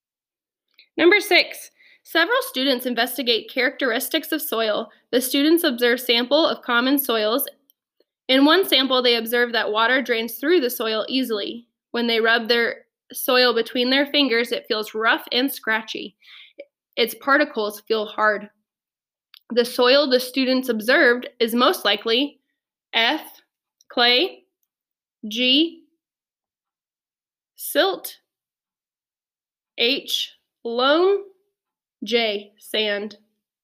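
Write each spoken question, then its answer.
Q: The soil the students observed is most likely F, clay, G, silt, H, loam, J, sand.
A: J: sand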